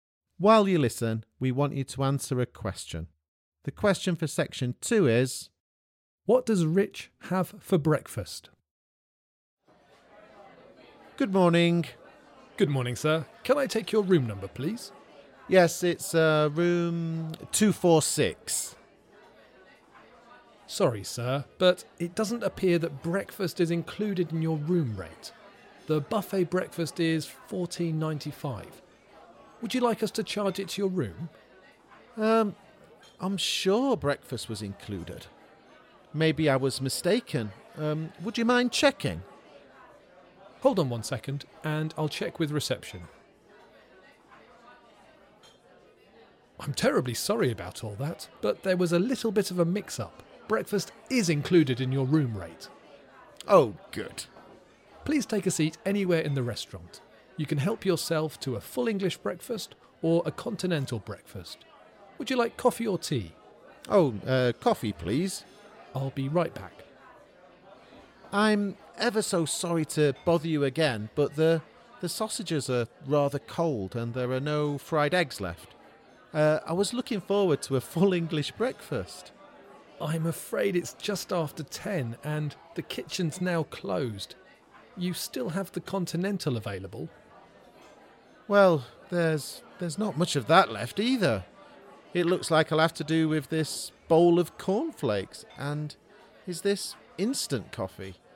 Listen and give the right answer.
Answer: You had a bowl of cornflakes and a cup of coffee.